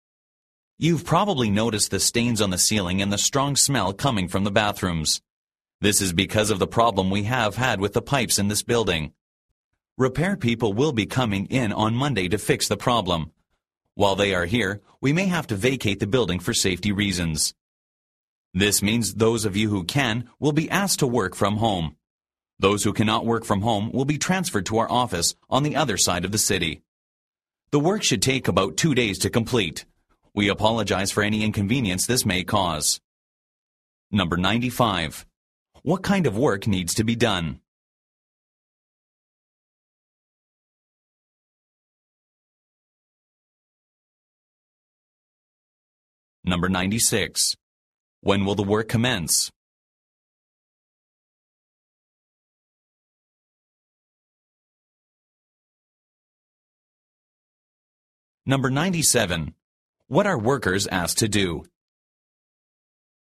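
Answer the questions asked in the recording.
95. Repairing the building's pipes
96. On Monday
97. Work from home, or move to the office on the other side of the city if they can't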